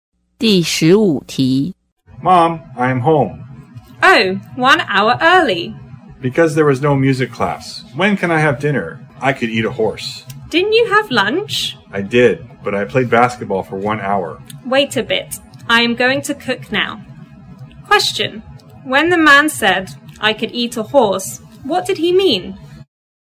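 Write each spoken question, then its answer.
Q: when the man said, I could eat a horse, what did he mean?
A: He was very hungry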